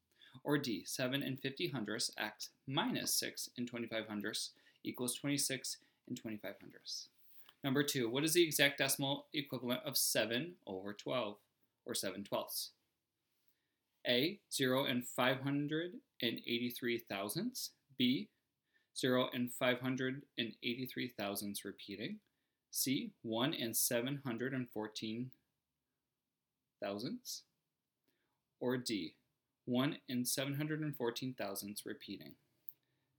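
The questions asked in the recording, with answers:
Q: what is the exact decimal equivalent of 7 over 12, or 7 twelfths?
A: B: 0.583 repeating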